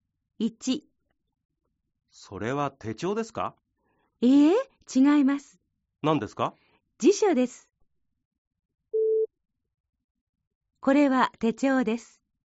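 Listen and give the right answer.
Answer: ×(辞書です)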